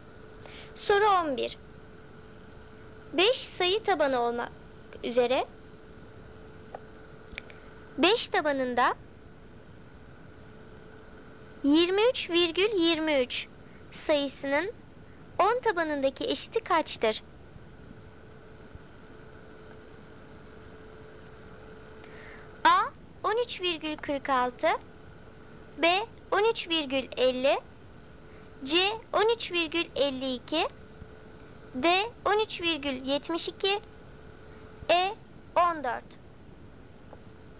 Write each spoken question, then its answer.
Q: 23,23 sayısının 10 tabanındaki eşiti kaçtır?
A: Doğru cevap C 13,52.